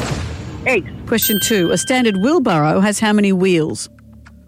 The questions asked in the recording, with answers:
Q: A standard wheelbarrow has how many wheels?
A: One.